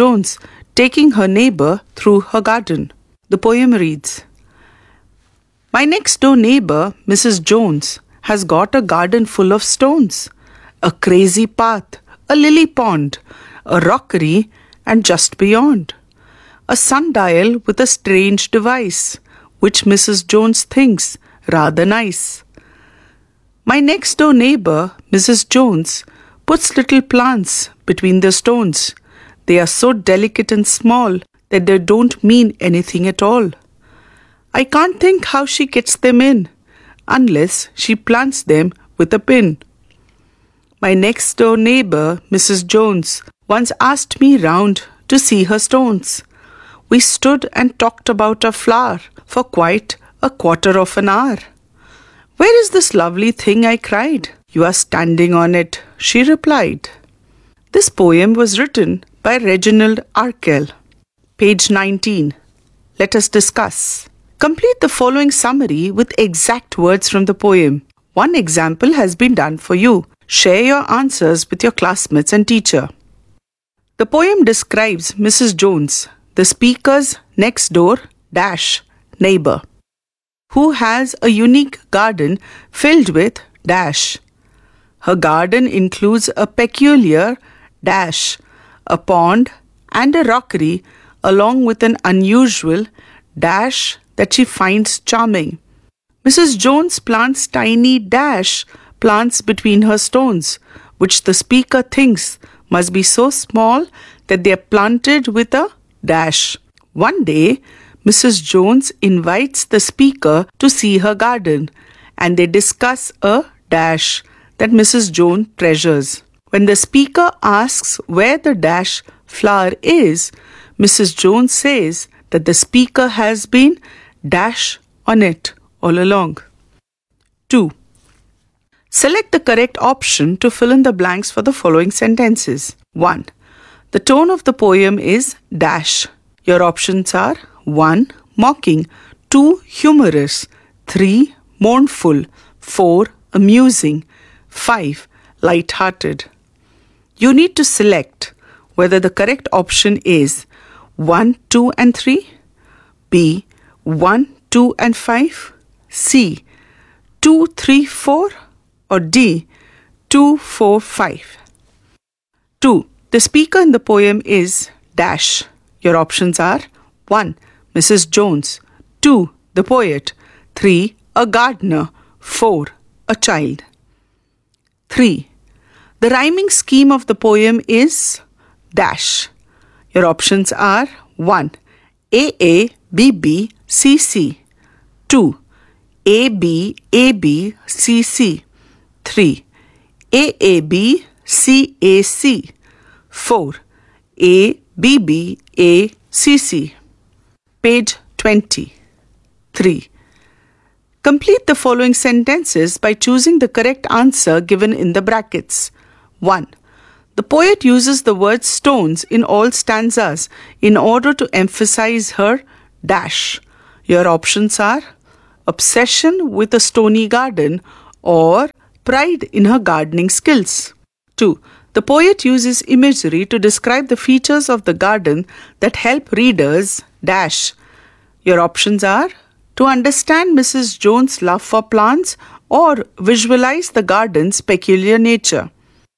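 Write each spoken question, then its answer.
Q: The tone of the poem is -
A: D: 2, 4, 5 (Humorous, Amusing, Light-hearted)

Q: The rhyming scheme of the poem is -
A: 1: AABBCC

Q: The poet uses the word stones in all stanzas in order to emphasize her -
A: obsession with a stony garden

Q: The poet uses imagery to describe the features of the garden that help readers dash.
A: visualize the garden's peculiar nature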